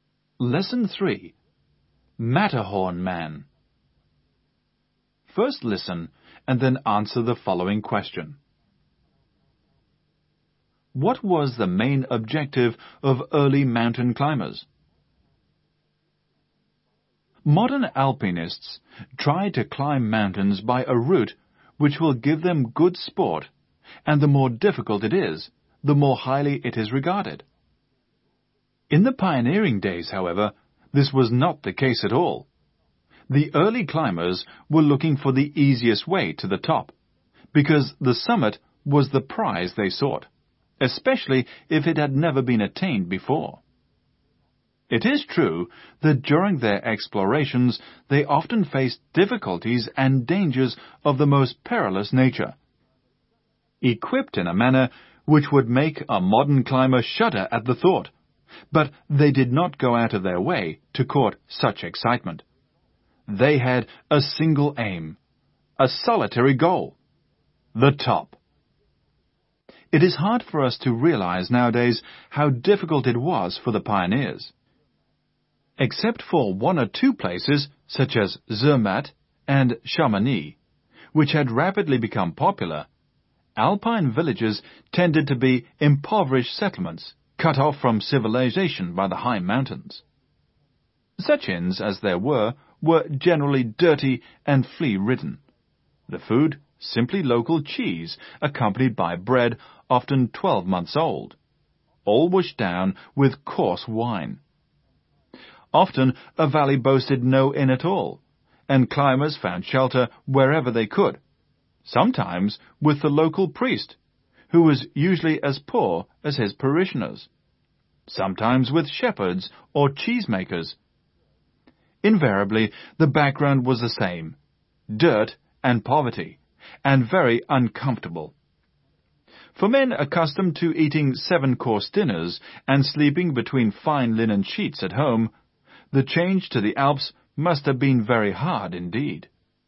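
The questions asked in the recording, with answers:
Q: What was the main objective of early mountain climbers?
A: To reach the summit (the top) by the easiest way, especially if it had never been reached before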